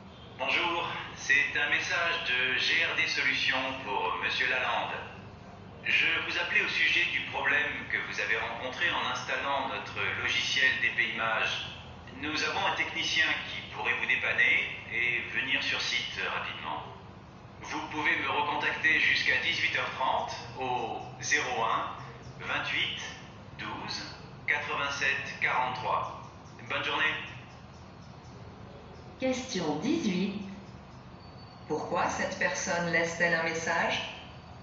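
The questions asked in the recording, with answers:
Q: Pourquoi cette personne laisse-t-elle un message?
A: Pour proposer l'intervention d'un technicien pour le problème d'installation du logiciel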